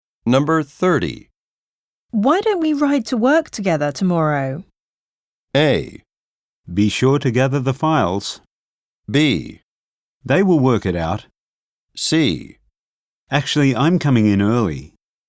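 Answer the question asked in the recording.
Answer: C: Actually, I'm coming in early.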